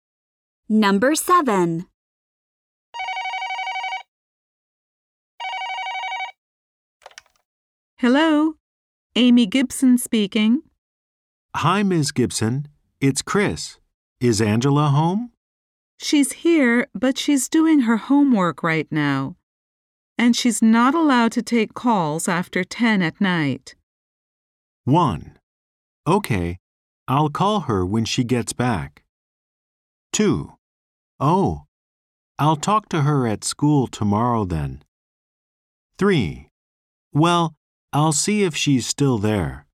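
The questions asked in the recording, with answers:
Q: And she's not allowed to take calls after 10 at night.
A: 2: Oh, I'll talk to her at school tomorrow then.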